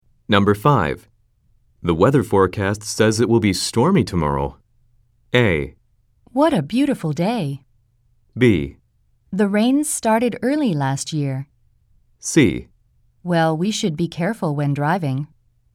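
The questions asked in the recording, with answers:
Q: The weather forecast says it will be stormy tomorrow.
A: C: Well, we should be careful when driving.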